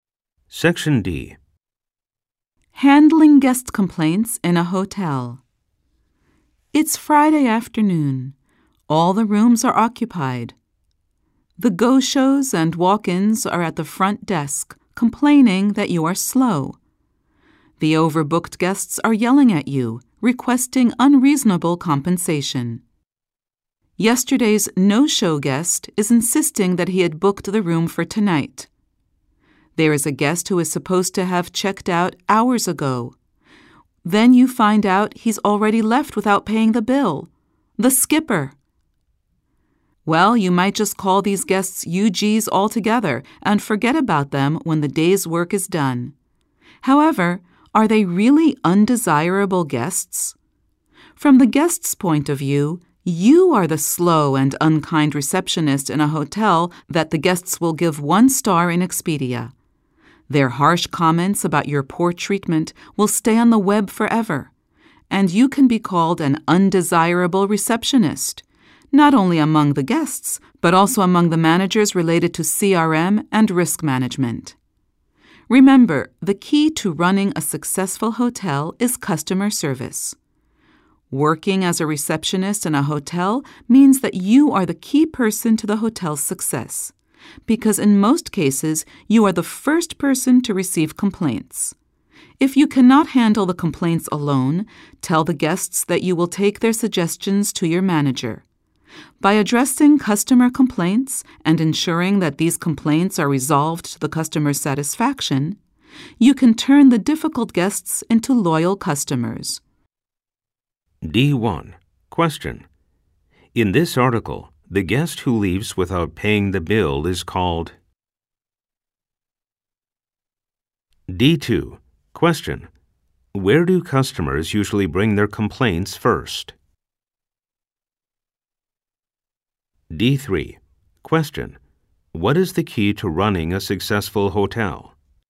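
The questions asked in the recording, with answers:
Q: In this article, the guest who leaves without paying the bill is called...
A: the skipper

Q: Where do customers usually bring their complaints first?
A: to the receptionist

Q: What is the key to running a successful hotel?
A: customer service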